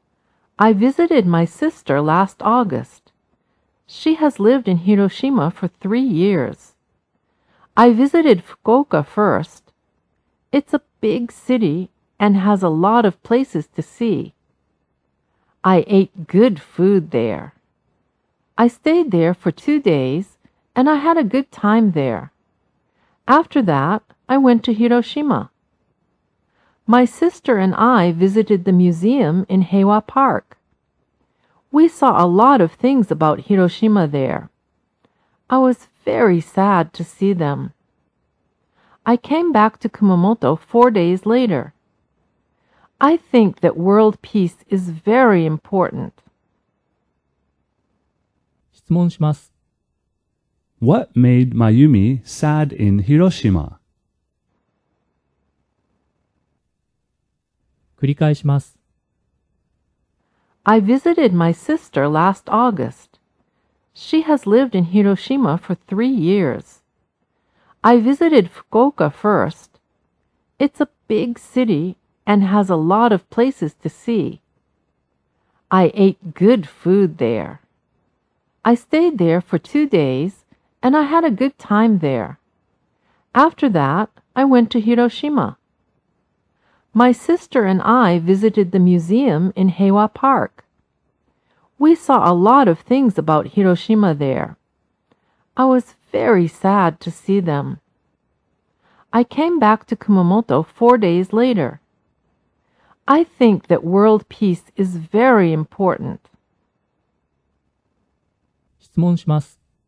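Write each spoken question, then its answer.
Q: What made Mayumi sad in Hiroshima?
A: The things about Hiroshima she saw in the museum in Heiwa Park.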